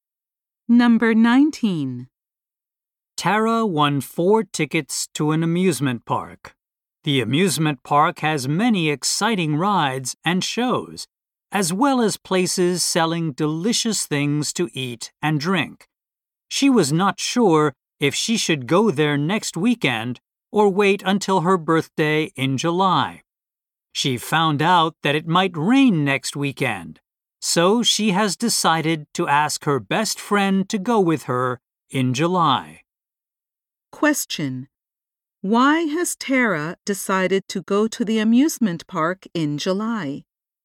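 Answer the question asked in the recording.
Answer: It might rain next weekend.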